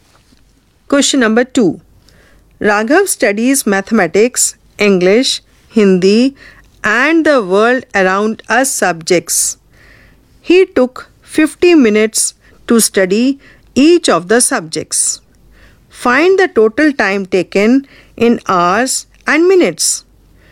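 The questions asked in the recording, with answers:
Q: Find the total time taken in hours and minutes.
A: 3 hours 20 minutes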